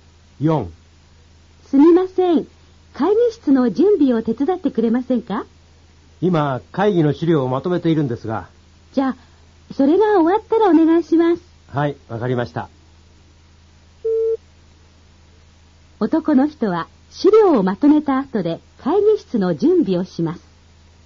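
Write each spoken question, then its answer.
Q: 男の人は資料をまとめた後で会議室の準備をします。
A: 正しい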